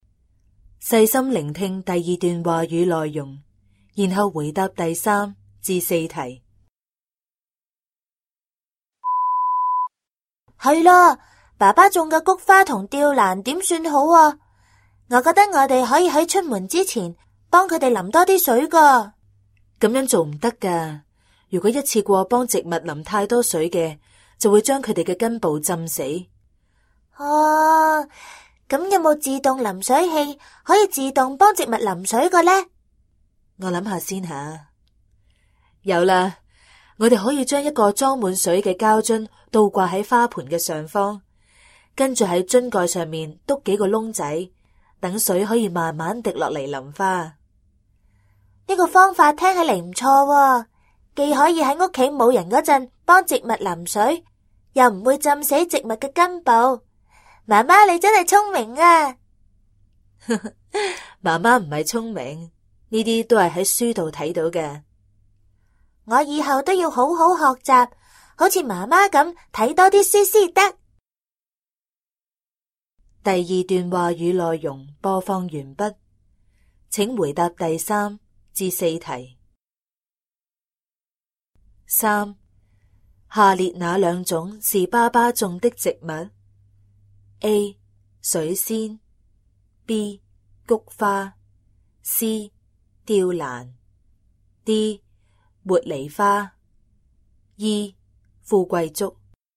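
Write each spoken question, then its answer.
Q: 下列哪两种是爸爸种的植物?A. 水仙 B. 菊花 C. 吊兰 D. 茉莉花 E. 富贵竹。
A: B: 菊花;C: 吊兰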